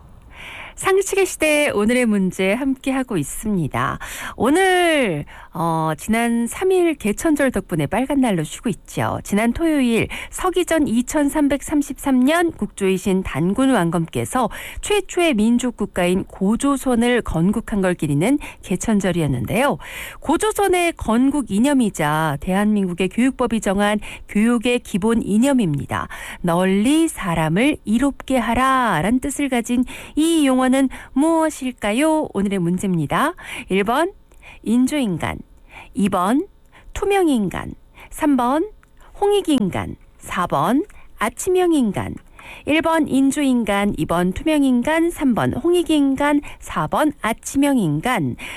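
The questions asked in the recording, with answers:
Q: 널리 사람을 이롭게 하라 라는 뜻을 가진 이 용어는 무엇일까요?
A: 3번: 홍익인간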